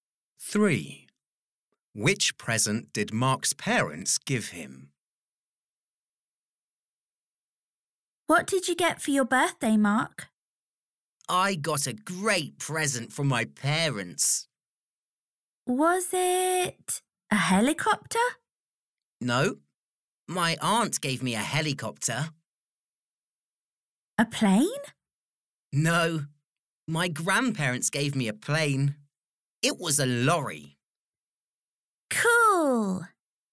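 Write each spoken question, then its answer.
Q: Which present did Mark's parents give him?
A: a lorry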